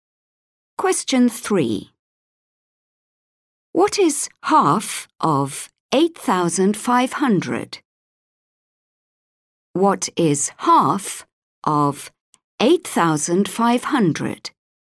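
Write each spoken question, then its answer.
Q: What is half of 8,500?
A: 4,250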